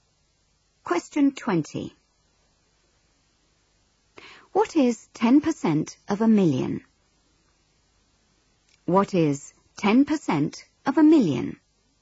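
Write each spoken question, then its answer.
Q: What is 10% of a million?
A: 100,000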